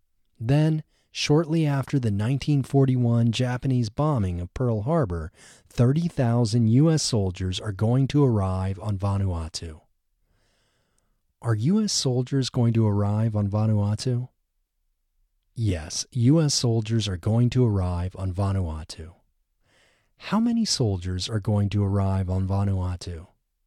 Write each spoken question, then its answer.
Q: How many soldiers are going to arrive on Vanuatu?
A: 30,000 soldiers are going to arrive on Vanuatu.